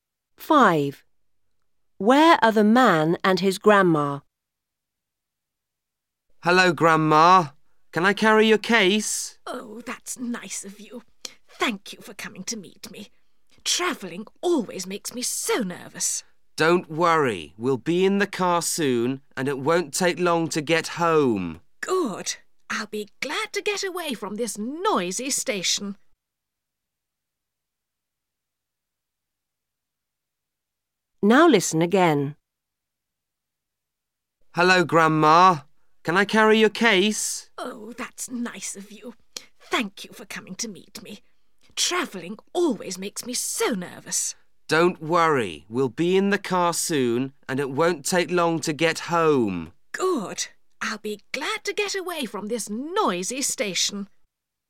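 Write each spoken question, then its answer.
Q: Where are the man and his grandma?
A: At the station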